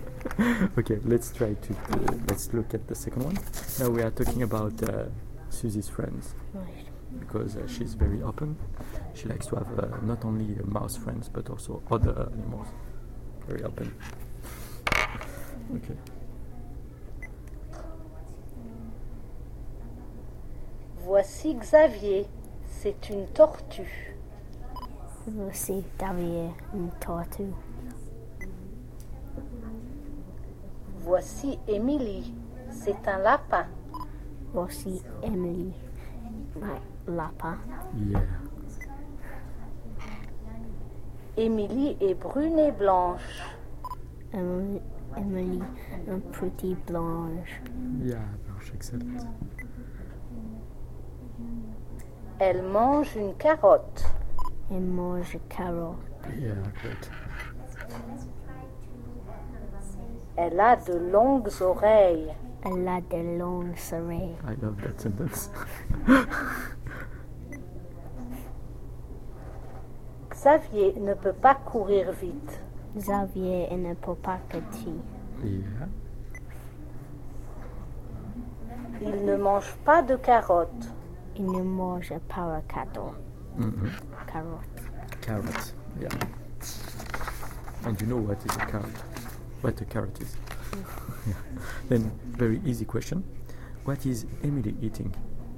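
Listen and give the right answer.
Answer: A carrot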